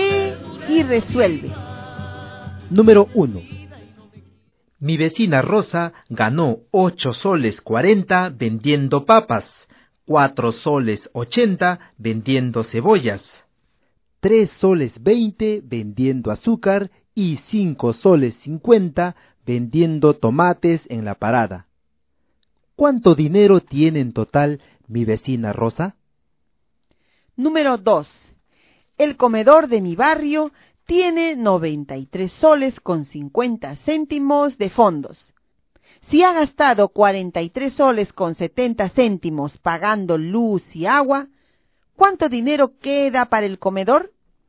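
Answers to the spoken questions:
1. 21 soles 90 céntimos
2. 49 soles 80 céntimos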